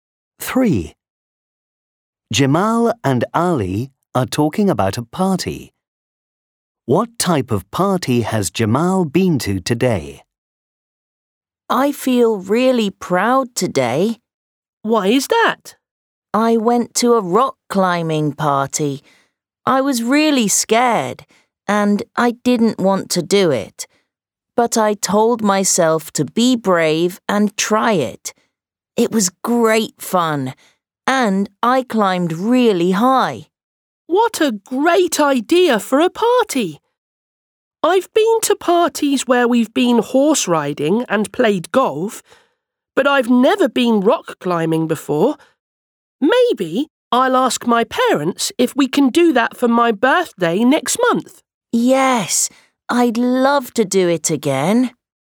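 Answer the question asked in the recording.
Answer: a rock climbing party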